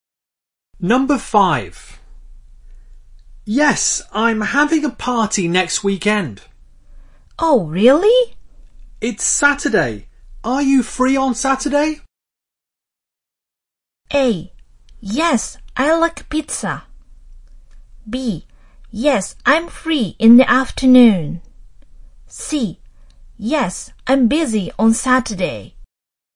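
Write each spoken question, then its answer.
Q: Are you free on Saturday?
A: B: Yes, I'm free in the afternoon.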